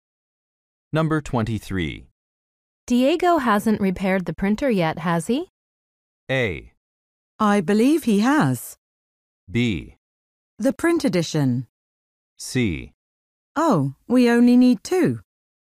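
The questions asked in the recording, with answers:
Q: Diego hasn't repaired the printer yet, has he?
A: A: I believe he has.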